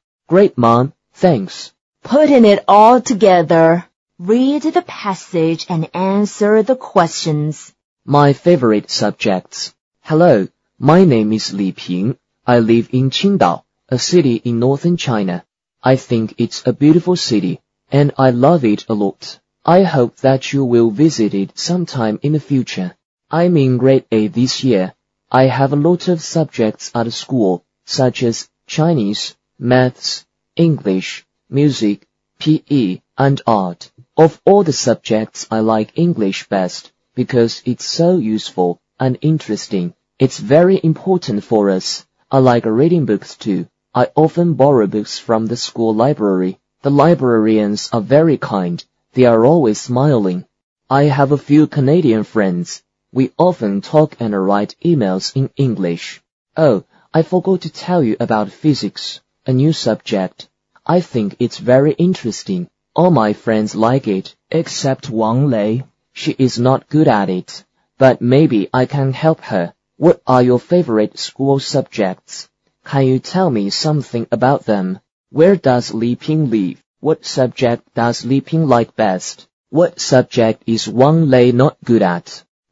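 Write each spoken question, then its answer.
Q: Where does Li Ping live?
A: In Qingdao

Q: What subject does Li Ping like best?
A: English

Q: What subject is Wang Lei not good at?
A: Physics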